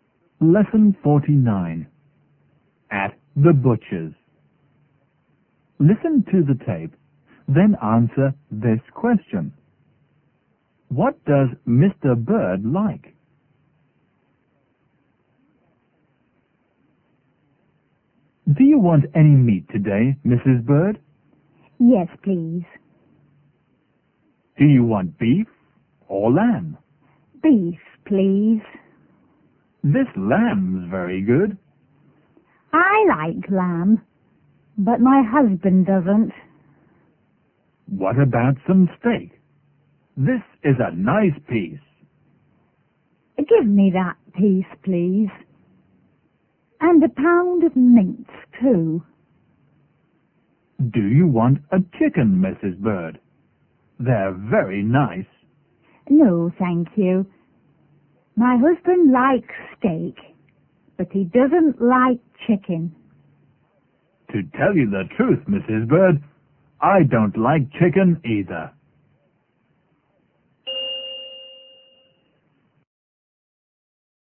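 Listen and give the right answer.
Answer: Steak (and beef), not lamb or chicken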